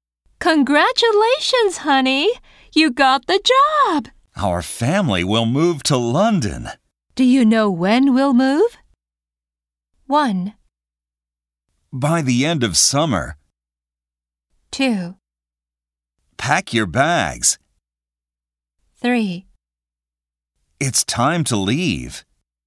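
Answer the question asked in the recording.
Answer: 1: By the end of summer.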